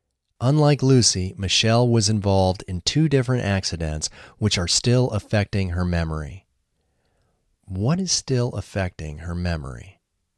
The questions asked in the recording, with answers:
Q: What is still affecting her memory?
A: The accidents are still affecting her memory.